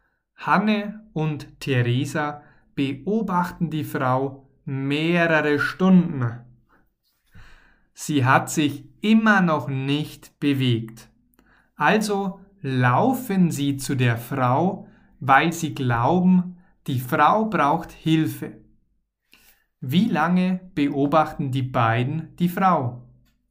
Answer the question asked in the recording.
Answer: mehrere Stunden. Sie beobachten die Frau mehrere Stunden